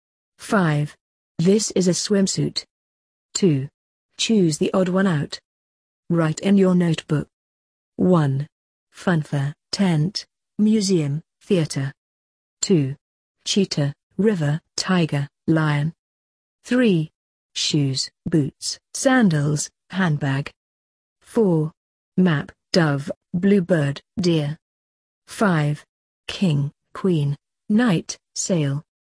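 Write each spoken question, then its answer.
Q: Cheetah, river, tiger, lion.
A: river

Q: Shoes, boots, sandals, handbag.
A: handbag

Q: Map, dove, bluebird, deer.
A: map

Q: King, queen, knight, sail.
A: sail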